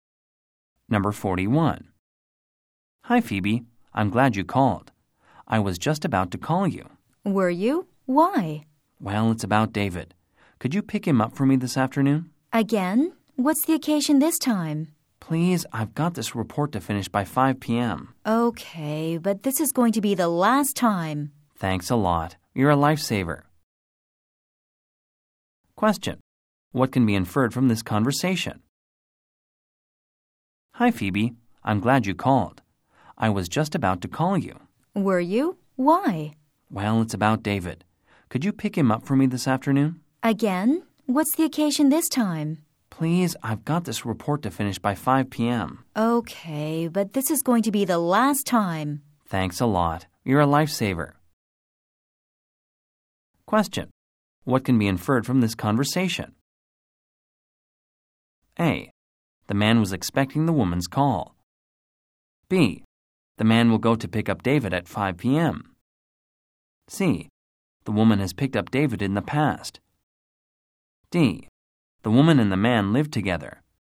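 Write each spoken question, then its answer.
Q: What can be inferred from this conversation?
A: C: The woman has picked up David in the past.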